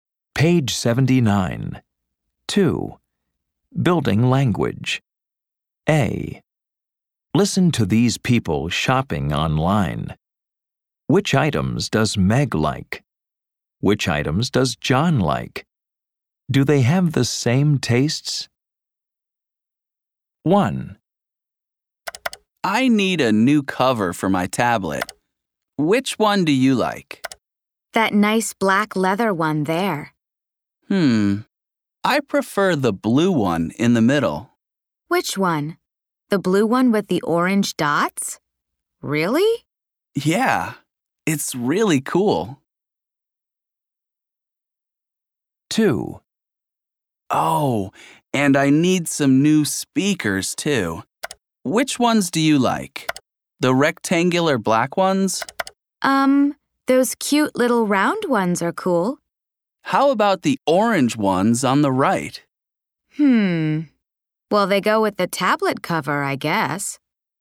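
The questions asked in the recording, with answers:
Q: Do they have the same tastes?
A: No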